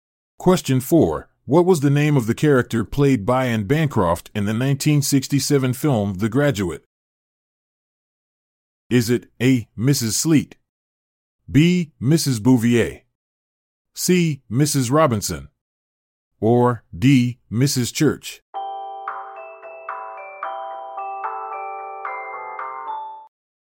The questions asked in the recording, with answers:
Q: what was the name of the character played by Anne Bancroft in the 1967 film The Graduate?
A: The answer is C. Mrs. Robinson